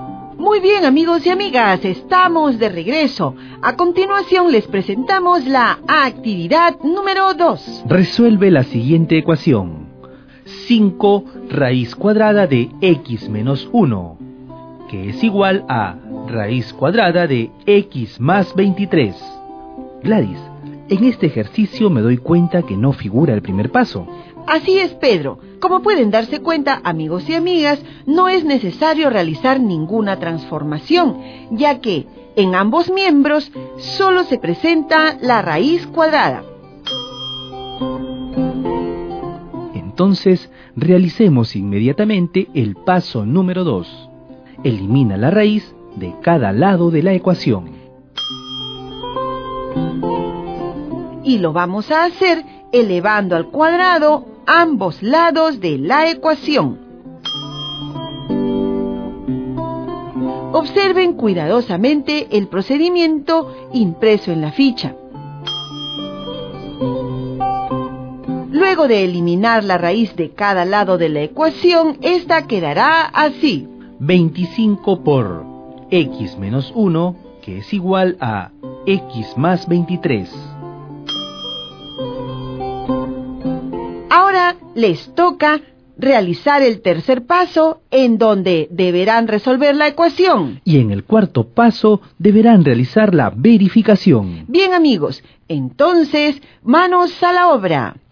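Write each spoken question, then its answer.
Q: Resuelve la siguiente ecuación.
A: x = 2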